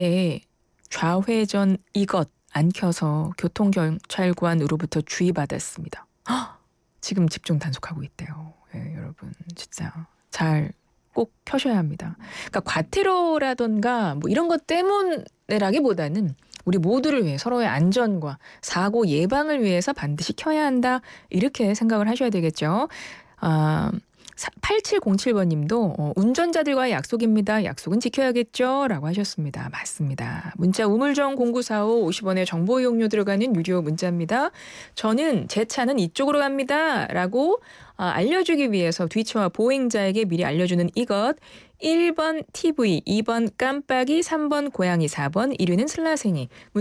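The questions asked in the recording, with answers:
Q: 저는 제 차는 이쪽으로 갑니다. 라고 알려주기 위해서 뒤처와 보행자에게 미리 알려주는 이것. 1번 TV, 2번 깜빡이, 3번 고양이, 4번 1위는 슬라생이.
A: 2: 깜빡이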